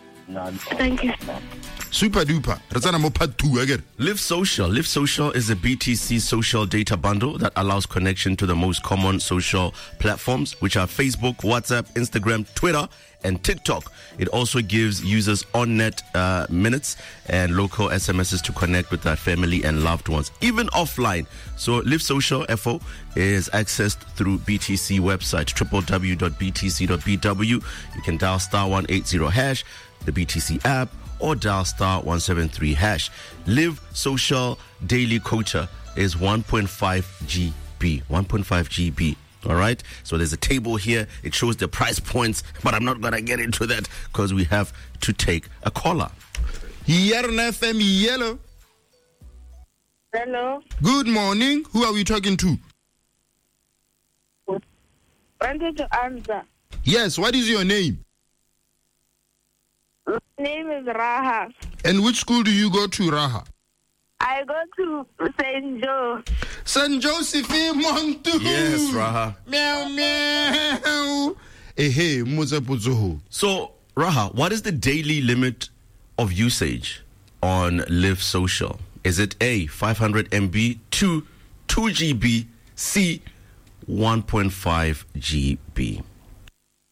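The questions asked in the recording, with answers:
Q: So, Raha, what is the daily limit of usage on Live Social?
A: C: 1.5 GB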